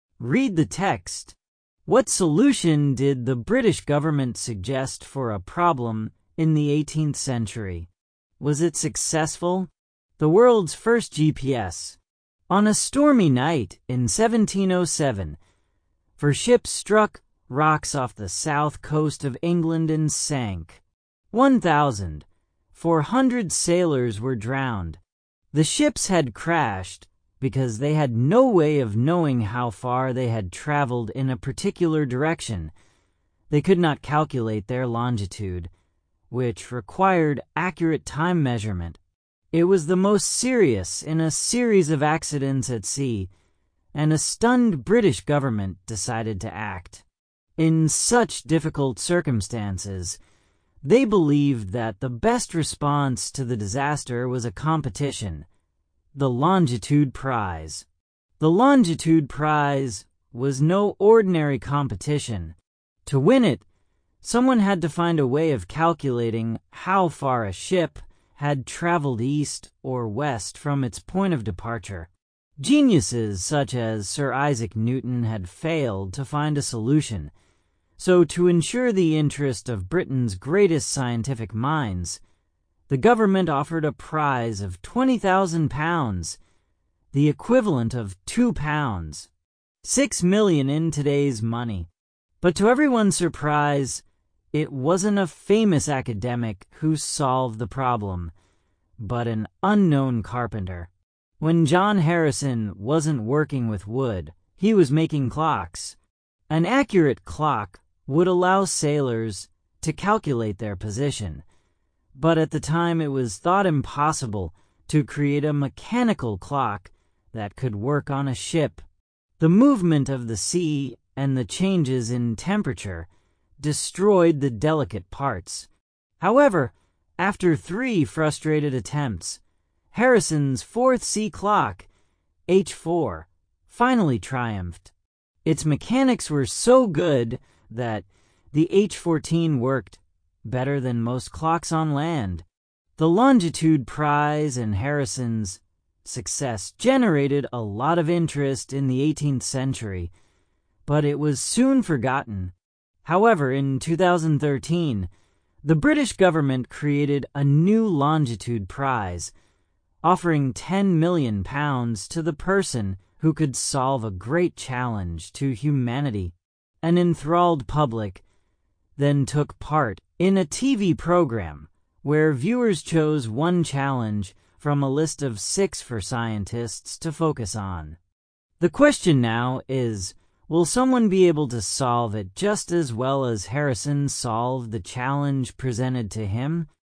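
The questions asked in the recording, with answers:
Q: What solution did the British government suggest for a problem in the 18th century?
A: A competition, the Longitude Prize

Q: Was it successful?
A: Yes, John Harrison's H4 sea clock solved the problem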